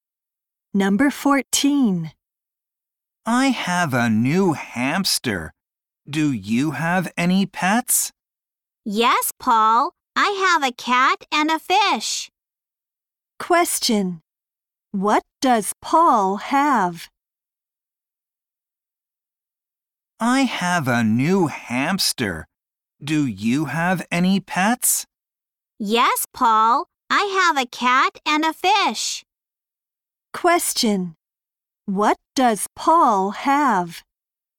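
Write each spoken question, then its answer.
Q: What does Paul have?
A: A new hamster.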